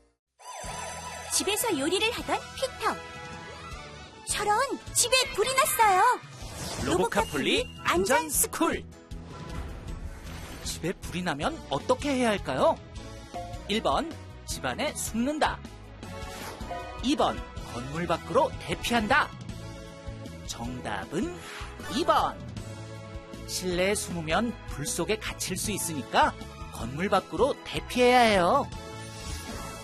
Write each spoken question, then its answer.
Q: 집에 불이 나면 어떻게 해야 할까요?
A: 정답은 2번.